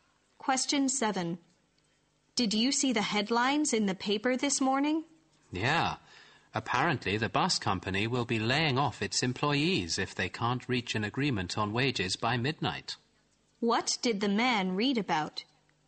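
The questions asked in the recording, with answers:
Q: What did the man read about?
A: The bus company may lay off its employees if no wage agreement is reached by midnight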